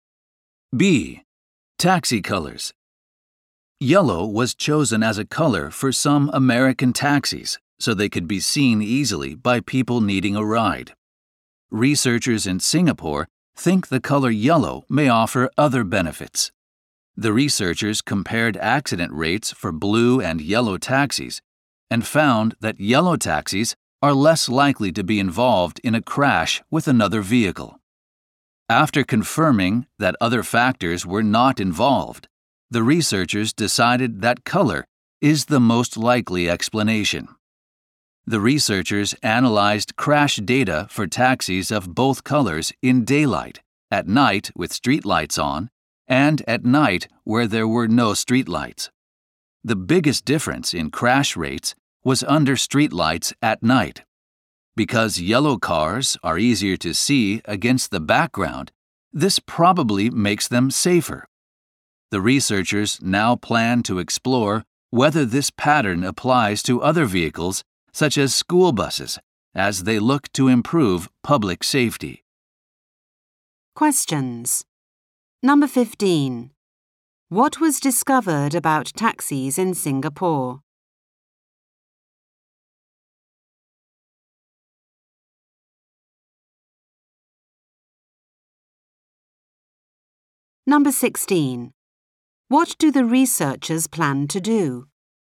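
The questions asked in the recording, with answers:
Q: What was discovered about taxis in Singapore?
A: Yellow taxis are less likely to crash with other vehicles than blue ones.

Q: What do the researchers plan to do?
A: Explore whether the pattern applies to other vehicles, such as school buses.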